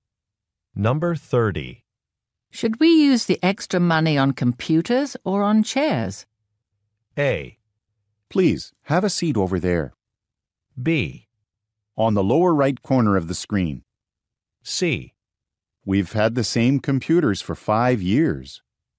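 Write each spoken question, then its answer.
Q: Should we use the extra money on computers or on chairs?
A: C: We've had the same computers for 5 years.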